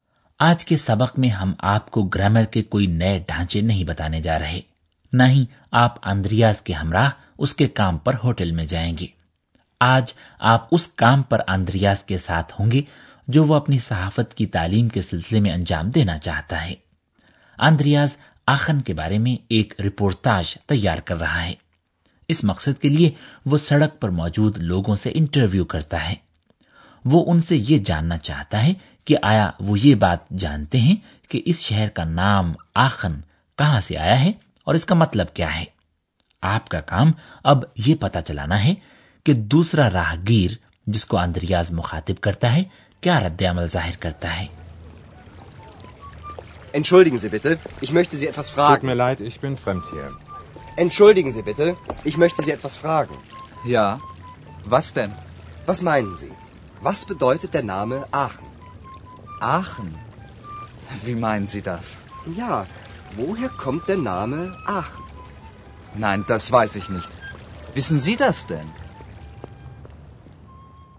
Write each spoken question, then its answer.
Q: آپ کا کام اب یہ پتا چلانا ہے کہ دوسرا راہ گیر جس کو اندریاز مخاطب کرتا ہے کیا رد عمل ظاہر کرتا ہے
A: دوسرا راہگیر جسے اندریاز مخاطب کرتا ہے نہیں جانتا کہ یہ نام آخن کہاں سے آیا ہے وہ اندریاز سے پوچھتا ہے کہ آیا وہ خود بھی یہ بات جانتا ہے